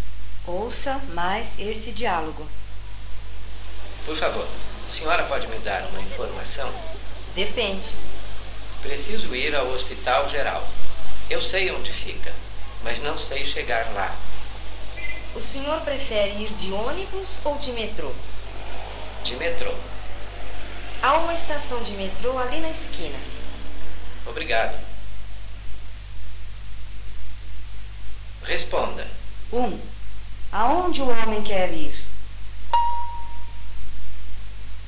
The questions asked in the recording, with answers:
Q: Aonde o homem quer ir?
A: Ele quer ir ao Hospital Geral.